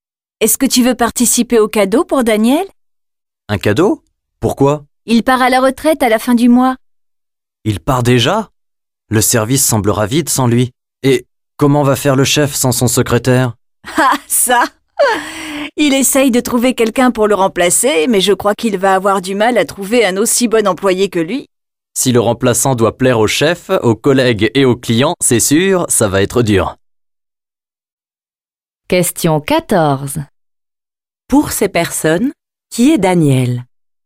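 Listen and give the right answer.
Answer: Un collègue, le secrétaire du chef, qui part à la retraite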